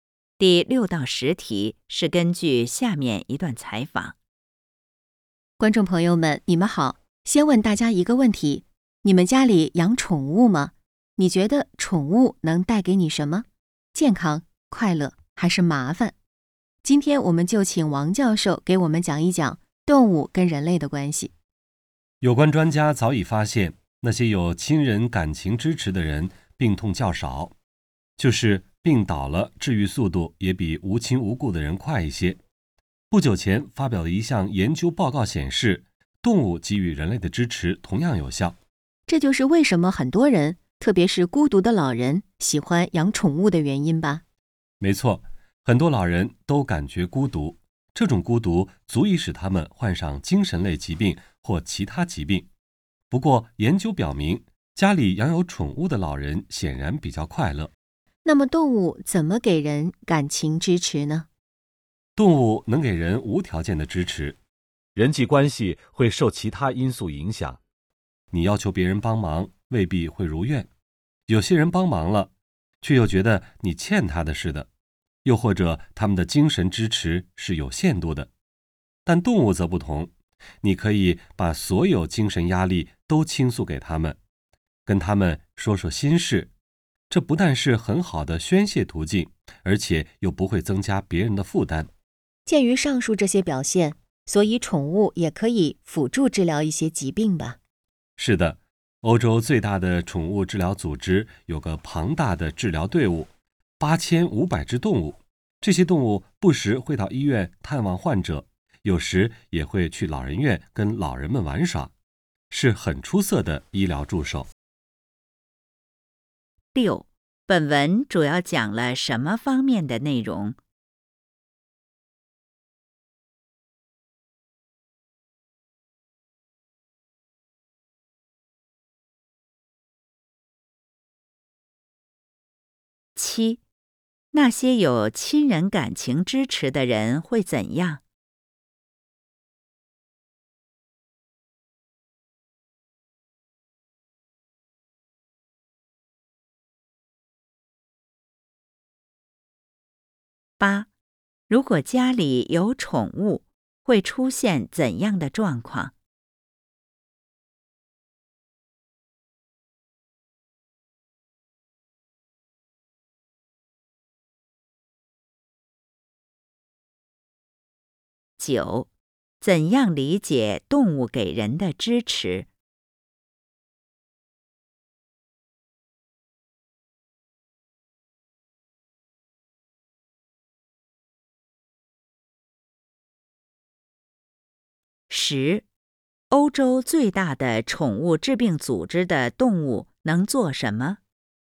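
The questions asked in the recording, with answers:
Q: 本文主要讲了什么方面的内容?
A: 动物(宠物)跟人类的关系

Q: 那些有亲人感情支持的人会怎样?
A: 病痛较少,病倒了治愈速度也更快

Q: 如果家里有宠物,会出现怎样的状况?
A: 老人会比较快乐

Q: 怎样理解动物给人的支持?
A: 动物给人的支持是无条件的

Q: 欧洲最大的宠物治病组织的动物能做什么?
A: 到医院探望患者,去老人院陪老人玩耍,做医疗助手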